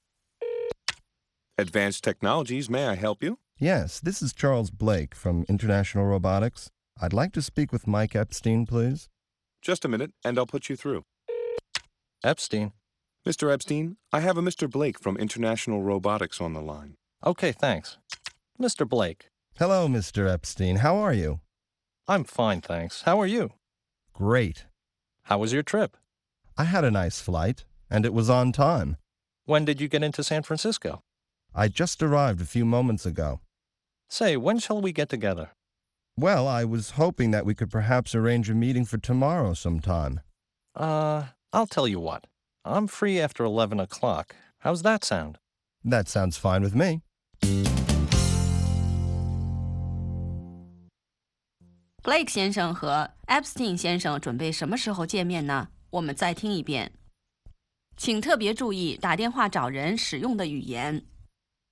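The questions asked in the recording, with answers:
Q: Blake 先生和 Epstein 先生准备什么时候见面呢?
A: 明天11点以后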